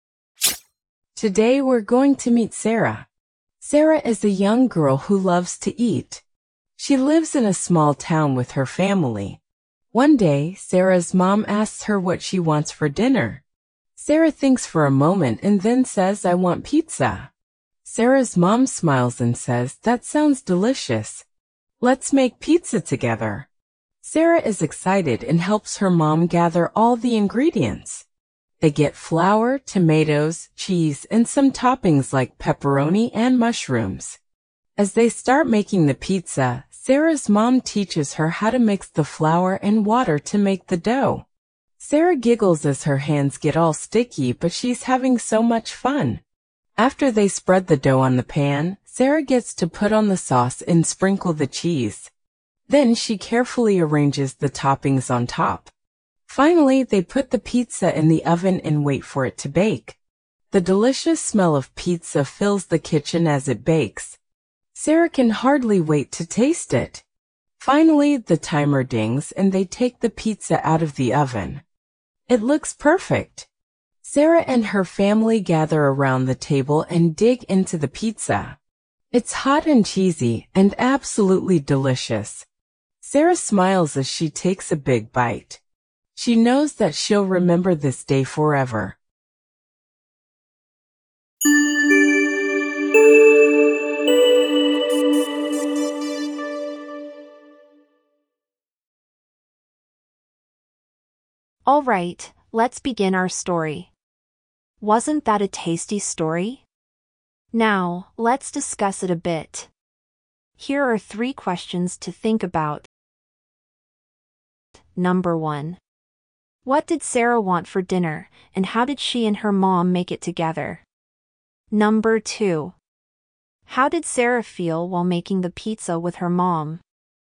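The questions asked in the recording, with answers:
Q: What did Sarah want for dinner, and how did she and her mom make it together?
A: Pizza; they mixed flour and water for the dough, spread it on the pan, added sauce, cheese and toppings, and baked it in the oven

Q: How did Sarah feel while making the pizza with her mom?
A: Excited and having lots of fun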